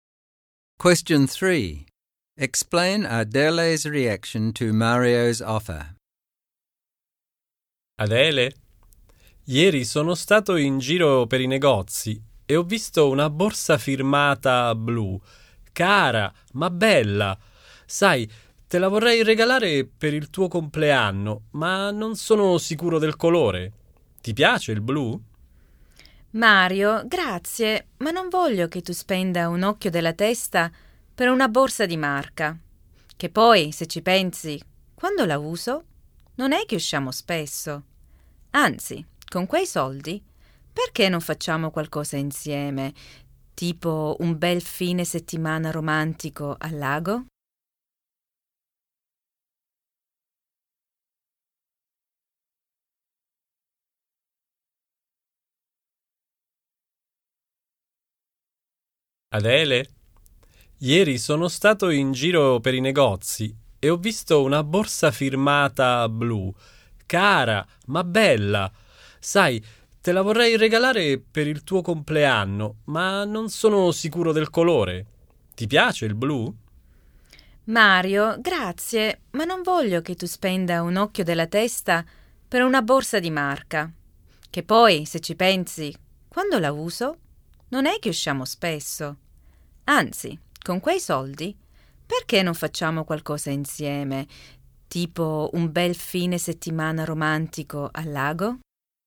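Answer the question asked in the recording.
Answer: She thanks him but turns down the expensive designer bag because they rarely go out. She suggests using the money for a romantic weekend at the lake instead.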